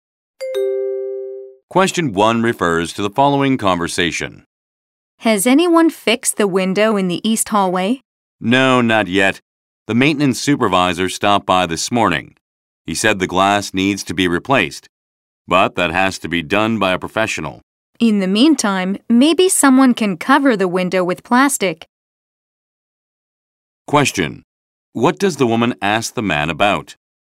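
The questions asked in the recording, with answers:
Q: What does the woman ask the man about?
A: Whether the window in the east hallway has been fixed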